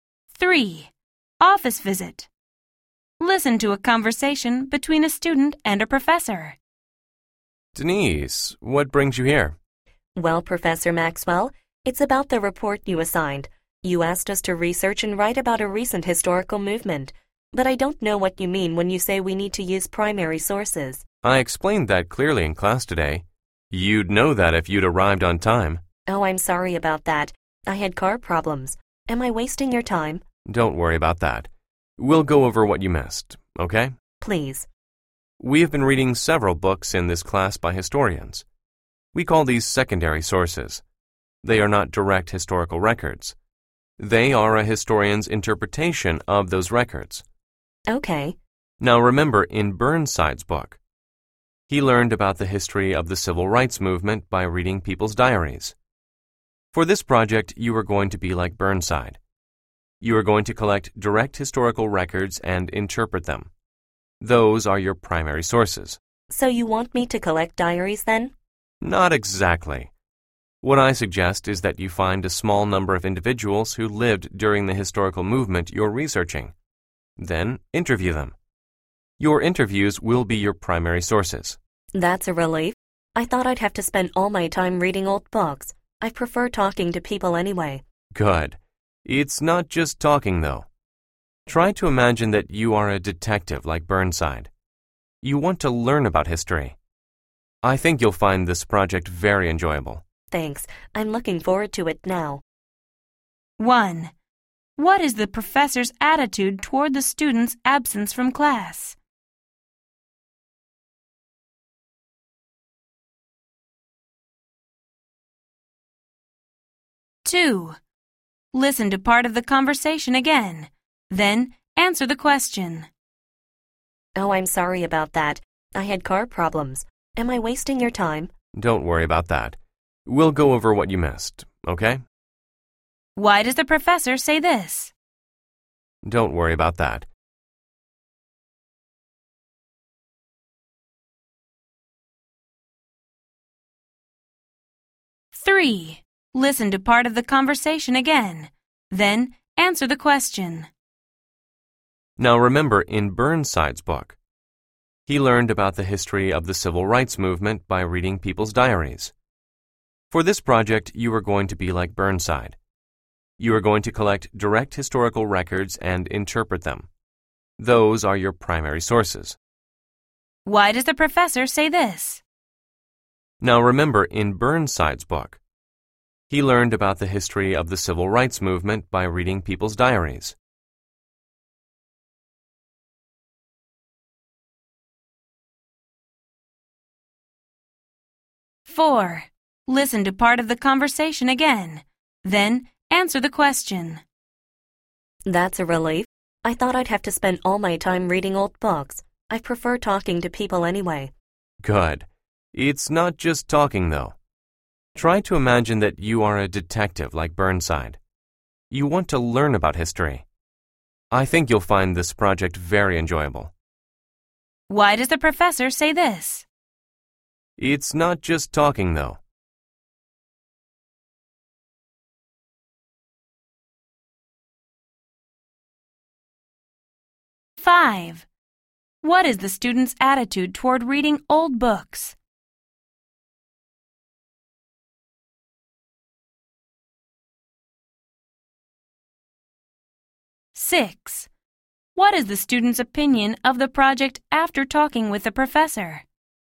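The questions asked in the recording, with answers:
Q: Five. What is the student's attitude toward reading old books?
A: She doesn't like it and prefers talking to people

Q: Six. What is the student's opinion of the project after talking with the professor?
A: She is looking forward to it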